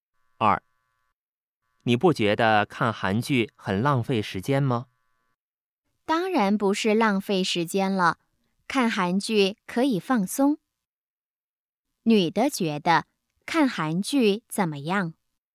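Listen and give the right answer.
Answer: 可以放松,不是浪费时间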